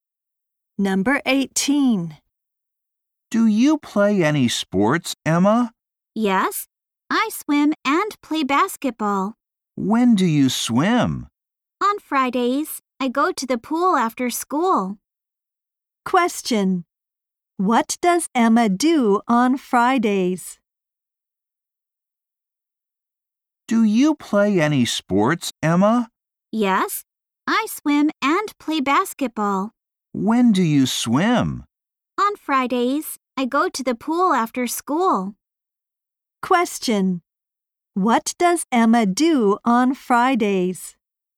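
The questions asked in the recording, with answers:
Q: What does Emma do on Fridays?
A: Goes swimming at the pool after school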